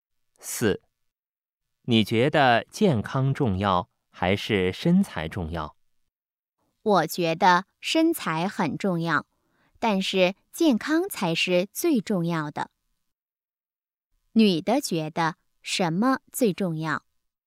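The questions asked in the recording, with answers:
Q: 女的觉得什么最重要?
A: 健康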